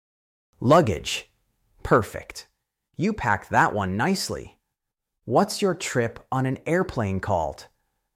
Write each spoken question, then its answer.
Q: What's your trip on an airplane called?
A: A flight.